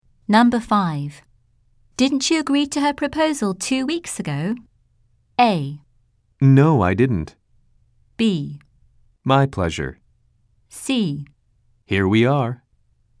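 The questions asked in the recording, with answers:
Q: Didn't you agree to her proposal 2 weeks ago?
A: A: No, I didn't.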